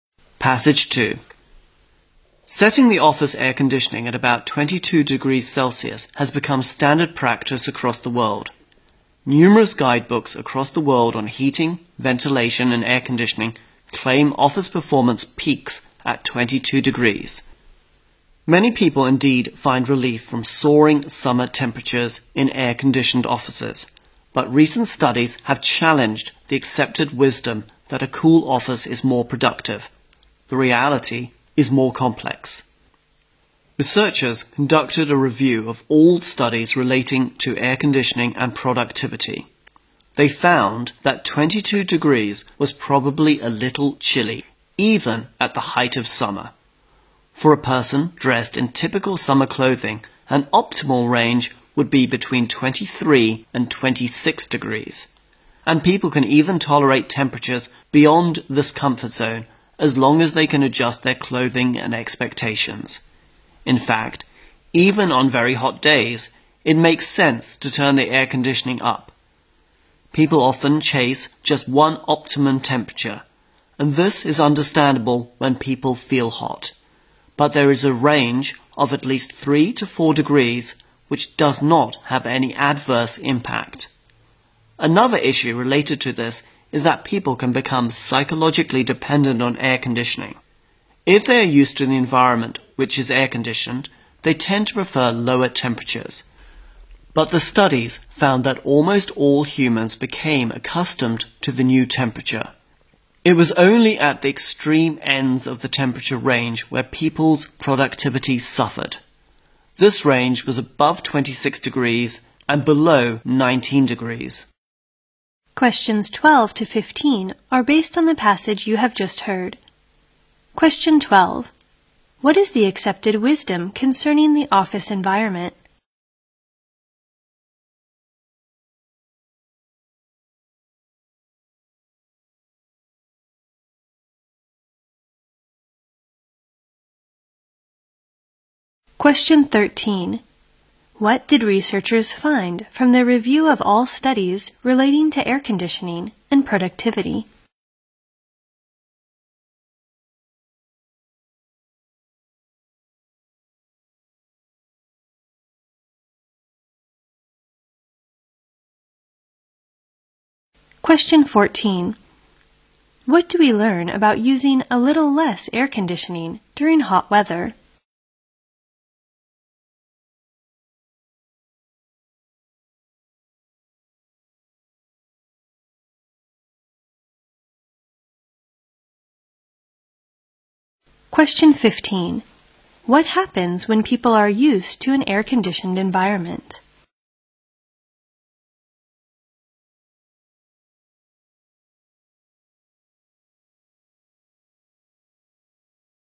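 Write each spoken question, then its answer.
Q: What is the accepted wisdom concerning the office environment?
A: A cool office (about 22°C) is more productive

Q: What did researchers find from their review of all studies relating to air conditioning and productivity?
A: 22 degrees is probably a little too chilly

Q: What happens when people are used to an air-conditioned environment?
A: They tend to prefer lower temperatures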